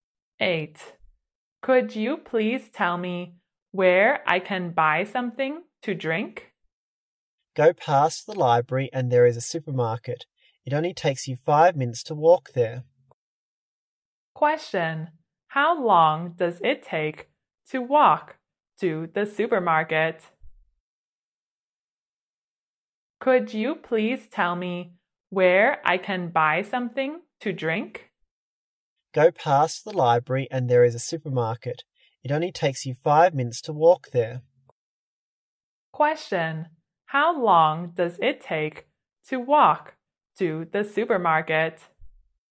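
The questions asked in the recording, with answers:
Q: Question, how long does it take to walk to the supermarket?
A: 5 minutes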